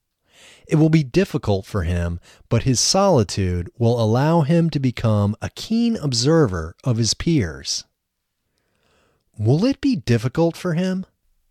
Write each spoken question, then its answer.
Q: Will it be difficult for him?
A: Yes, it will be difficult for him.